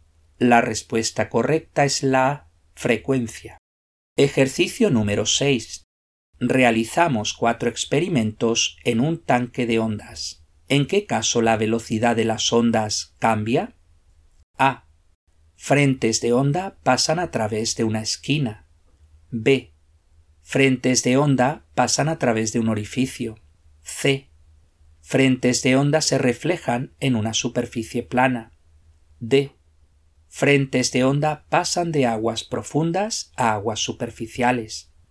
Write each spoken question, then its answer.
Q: ¿En qué caso la velocidad de las ondas cambia?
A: La respuesta correcta es la D.